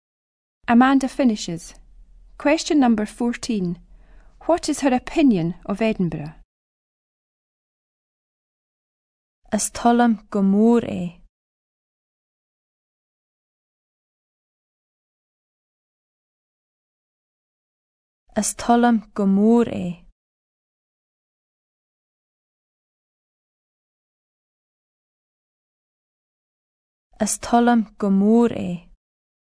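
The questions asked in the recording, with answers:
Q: What is her opinion of Edinburgh?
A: She likes it a lot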